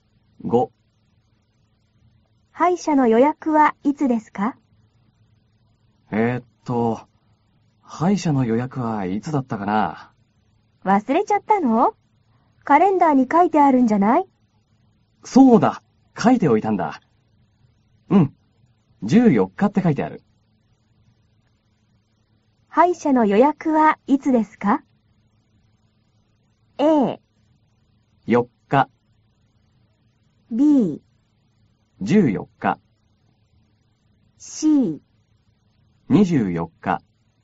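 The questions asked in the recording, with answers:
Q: 歯医者の予約はいつですか?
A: B: 14日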